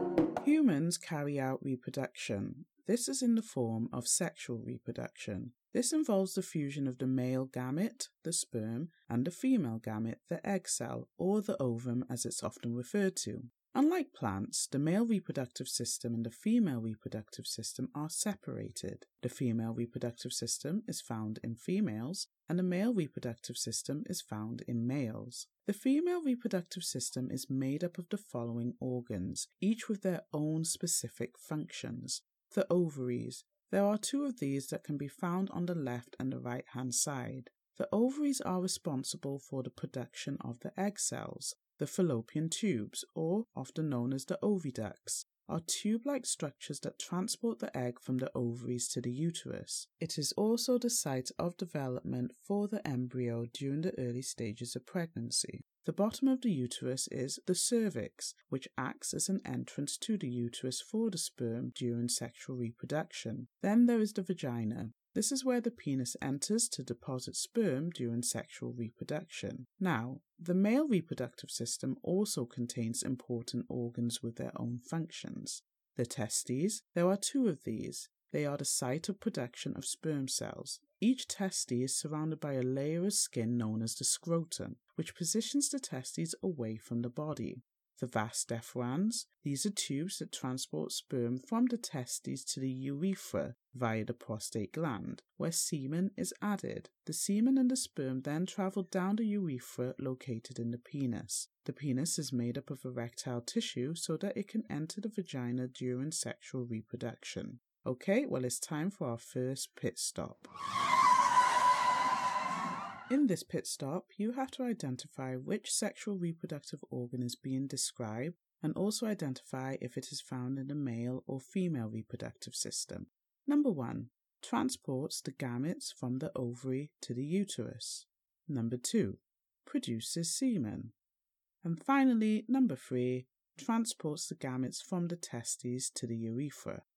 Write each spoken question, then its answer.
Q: Transports the gametes from the ovary to the uterus.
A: This is the oviduct or fallopian tube, and it's found in the female reproductive system.

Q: Produces semen.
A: This is done by the prostate gland and is found in the male reproductive system.

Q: Transports the gametes from the testes to the urethra.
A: This is the vas deferens and it is found in the male reproductive system.